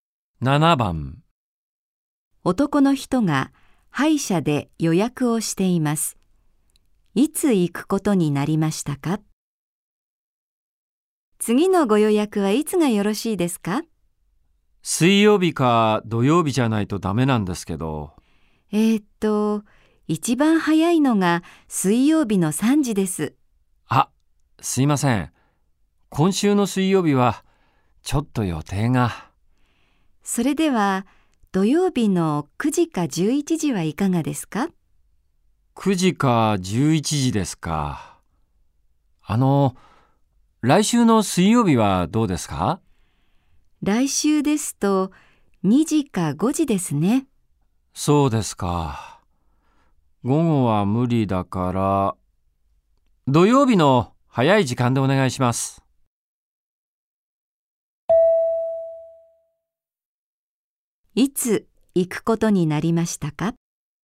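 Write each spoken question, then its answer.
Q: いつ行くことになりましたか?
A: 土曜日の9時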